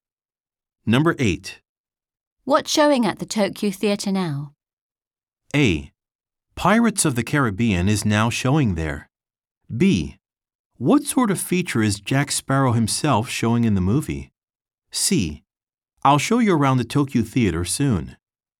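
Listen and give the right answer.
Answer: A: Pirates of the Caribbean is now showing there.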